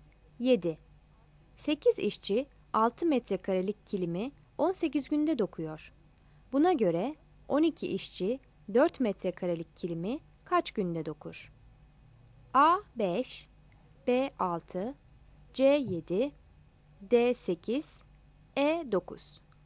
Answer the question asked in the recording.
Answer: Yanıt D'dir.